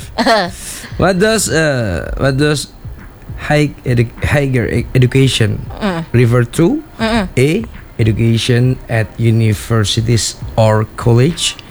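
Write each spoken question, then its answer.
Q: What does higher education refer to?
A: A: education at universities or college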